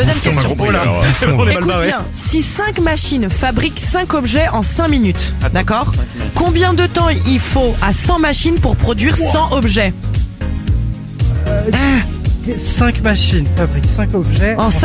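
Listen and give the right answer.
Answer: 5 minutes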